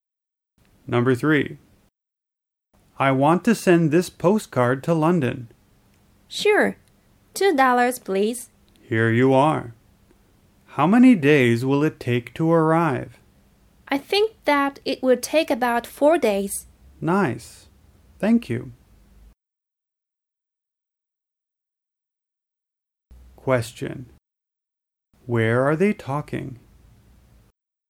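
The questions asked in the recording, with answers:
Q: Where are they talking?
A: At a post office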